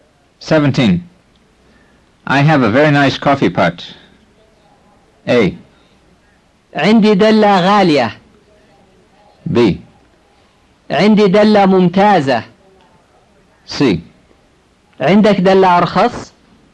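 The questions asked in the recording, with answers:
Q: I have a very nice coffee pot.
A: B: عندي دلة ممتازة.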